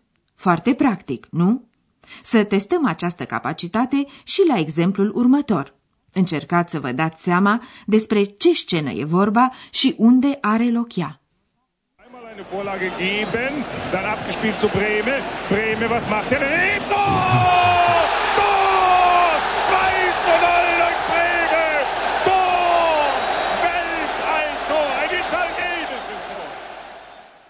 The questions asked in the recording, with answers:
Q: Încercați să vă dați seama despre ce scenă e vorba și unde are loc ea.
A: e vorba de o manifestație sportivă, mai exact de un meci de fotbal, care se desfășoară într-un stadion.